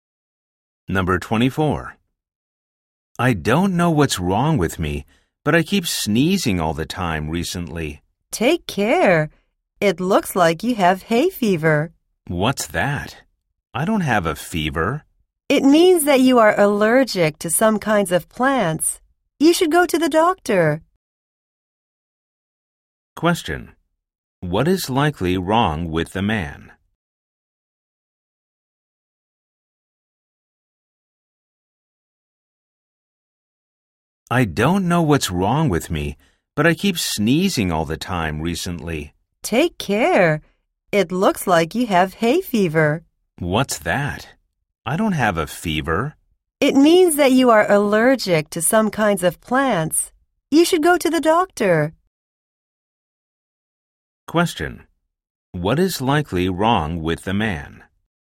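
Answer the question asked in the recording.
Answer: He has hay fever (an allergy to plants)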